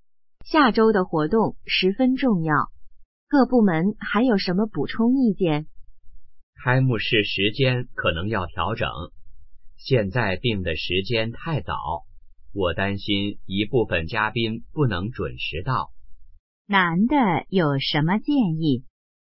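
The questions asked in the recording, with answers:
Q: 男的有什么建议?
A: 调整开幕式时间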